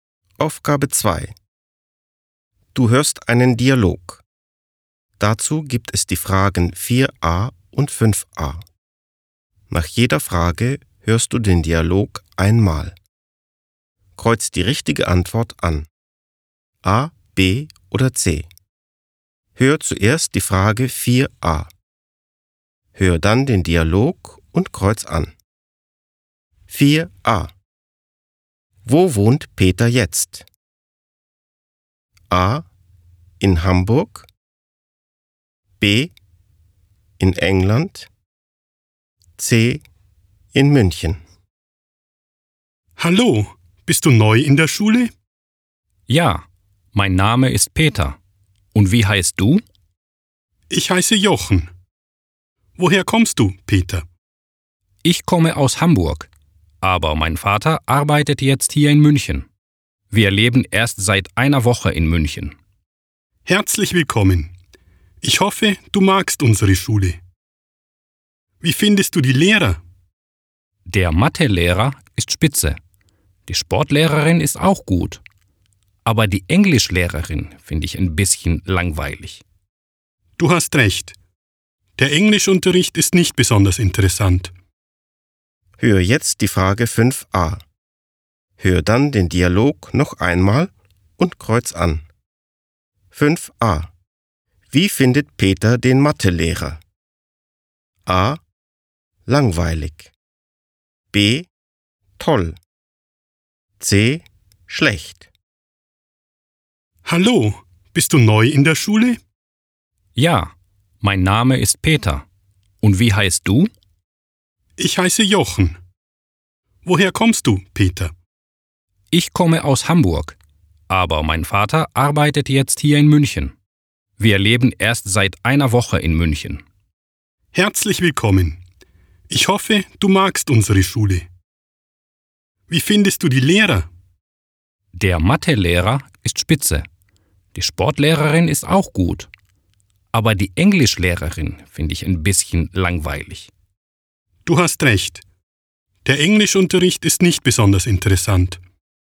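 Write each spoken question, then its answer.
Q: Wo wohnt Peter jetzt?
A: C: In München

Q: Wie findet Peter den Mathelehrer?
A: B: Toll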